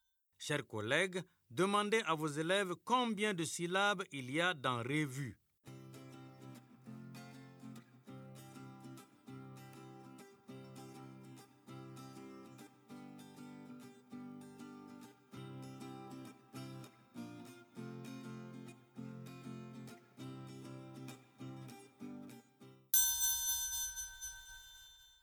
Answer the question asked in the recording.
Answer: Revue. Monsieur, deux syllabes.